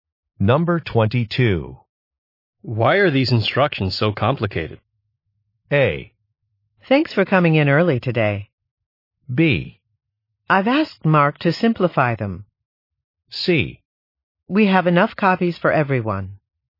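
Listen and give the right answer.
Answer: B: I've asked Mark to simplify them.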